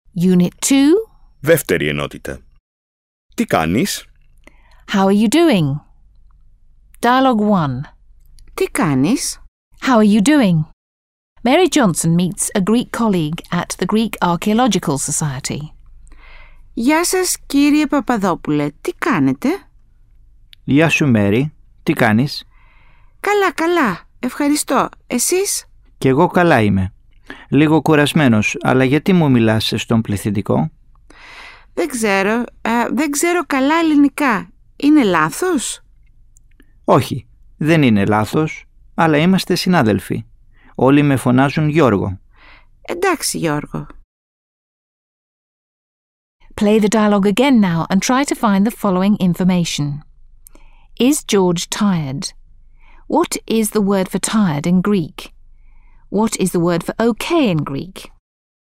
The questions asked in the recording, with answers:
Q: Is George tired?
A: George is a little bit tired.

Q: What is the word for tired in Greek?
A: Λίγο κουρασμένος.

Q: What is the word for okay in Greek?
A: Εντάξει. Is the Greek word for okay.